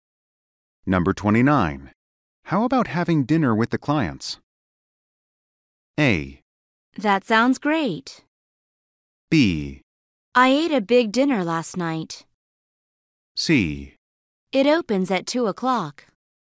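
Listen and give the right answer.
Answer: A: That sounds great.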